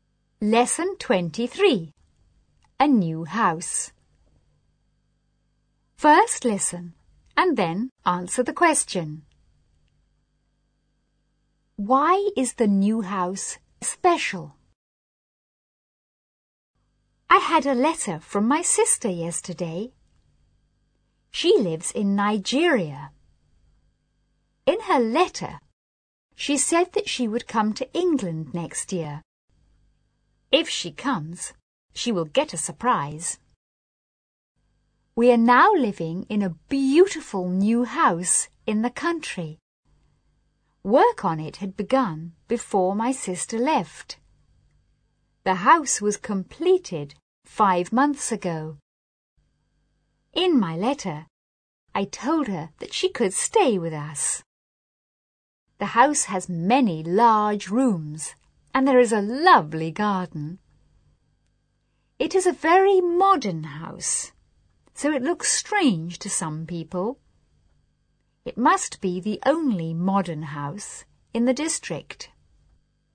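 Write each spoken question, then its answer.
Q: Why is the new house special?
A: It is very modern, probably the only modern house in the district.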